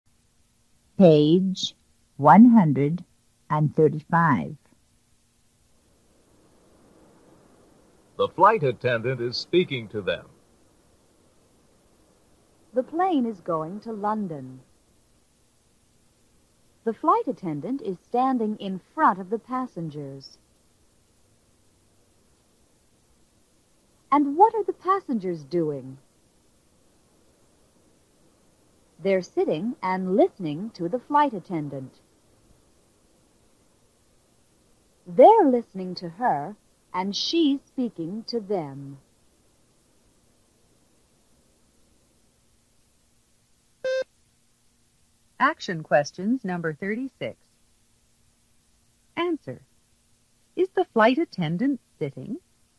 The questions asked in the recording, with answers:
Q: Answer. Is the flight attendant sitting?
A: No, she's not.